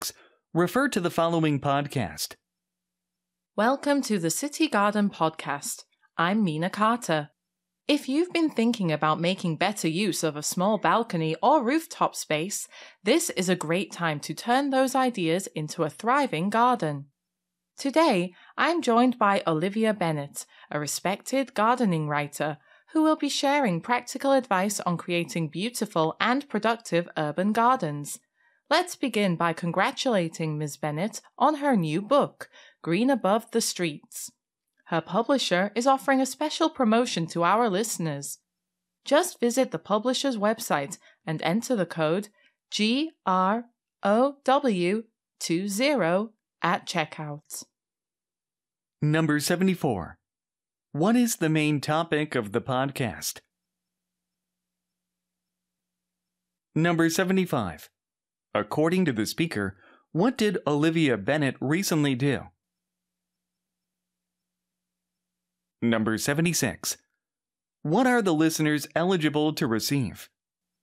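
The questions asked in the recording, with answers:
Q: What is the main topic of the podcast?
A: Urban gardening in small spaces like balconies and rooftops

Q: According to the speaker, what did Olivia Bennett recently do?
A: She published a new book, Green Above the Streets

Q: What are the listeners eligible to receive?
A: A special discount on the book with the code GROW20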